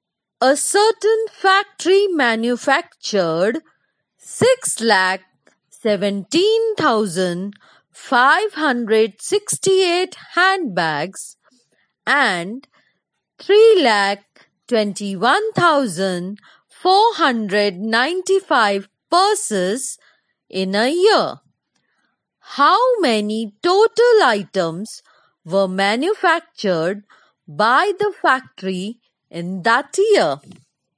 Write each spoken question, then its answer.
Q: How many total items were manufactured by the factory in that year?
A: 939,063 items were manufactured by the factory that year.